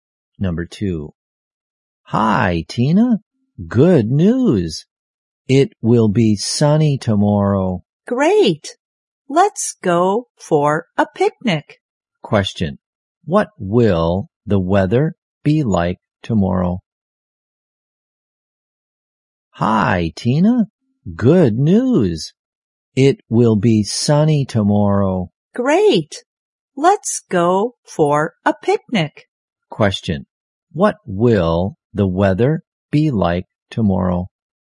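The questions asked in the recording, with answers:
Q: Question. What will the weather be like tomorrow?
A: Sunny.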